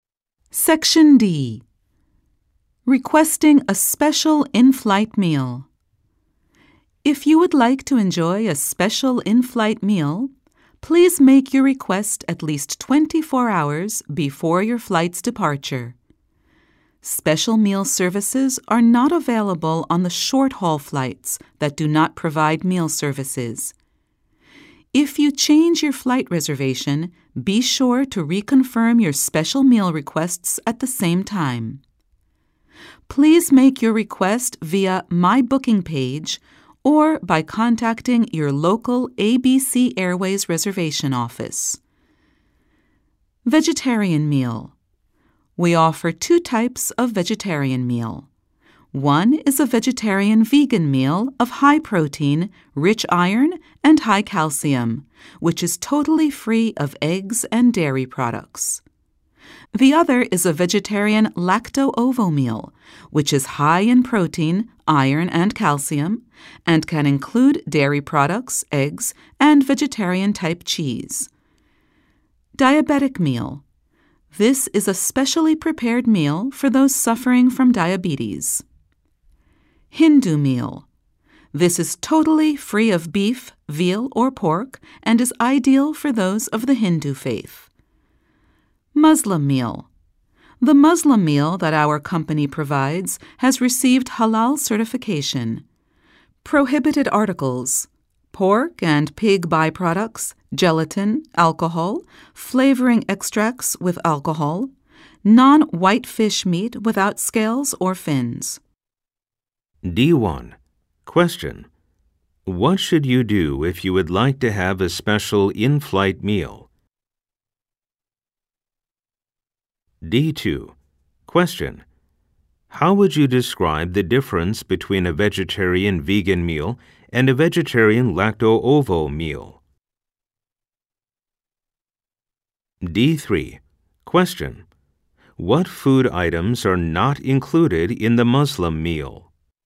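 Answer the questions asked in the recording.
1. Make a request at least 24 hours before departure, via the My Booking page or the local ABC Airways reservation office
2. The vegan meal has no eggs or dairy products; the lacto-ovo meal can include dairy products, eggs and vegetarian-type cheese
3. Pork and pig byproducts, gelatin, alcohol, flavoring extracts with alcohol, and non-white fish meat without scales or fins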